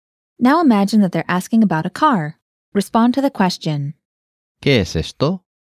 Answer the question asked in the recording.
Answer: Es un coche.